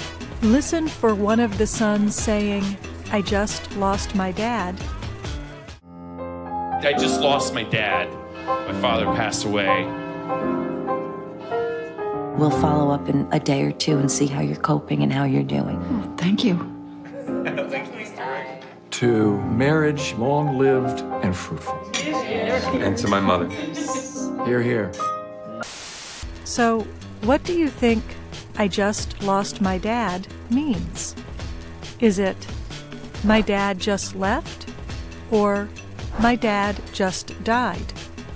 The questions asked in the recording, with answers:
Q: So, what do you think I just lost my dad means?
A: I just lost my dad means my dad just died.